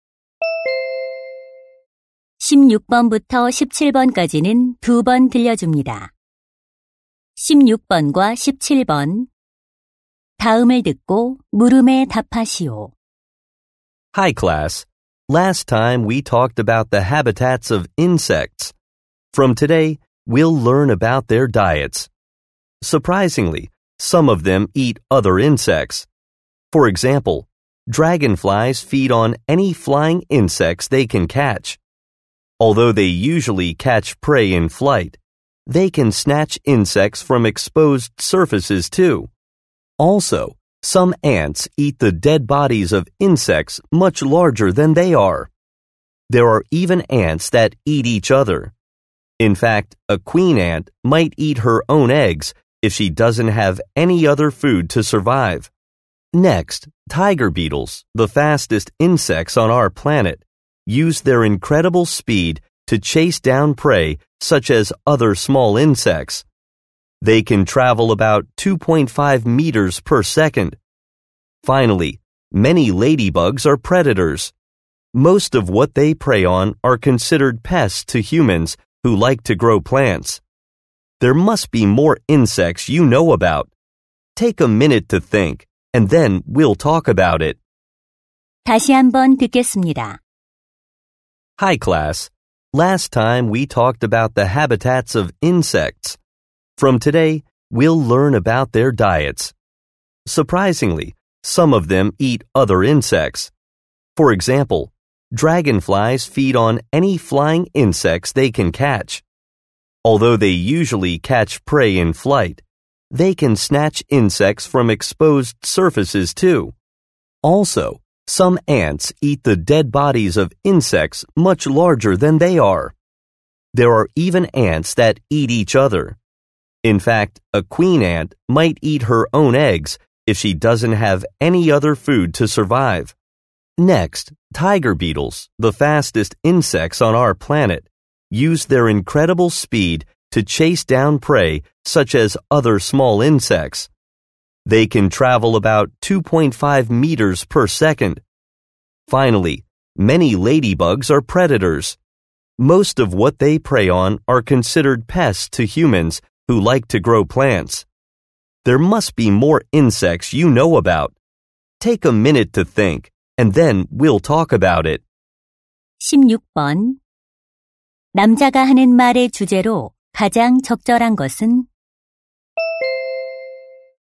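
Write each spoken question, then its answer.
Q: 남자가 하는 말의 주제로 가장 적절한 것은?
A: 다른 곤충을 잡아먹는 곤충들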